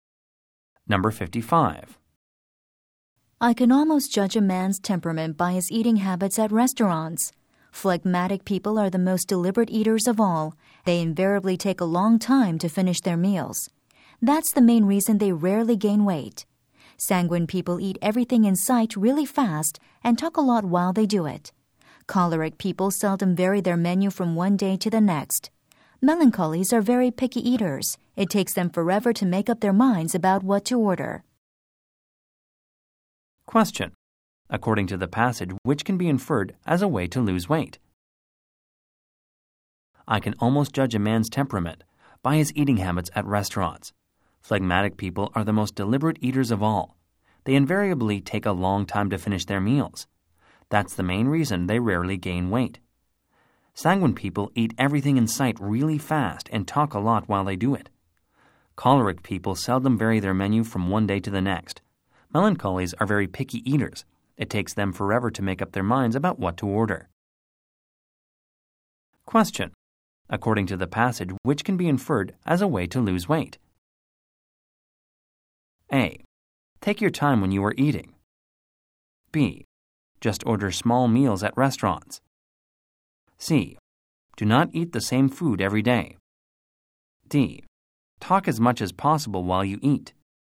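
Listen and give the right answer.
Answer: A: Take your time when you are eating.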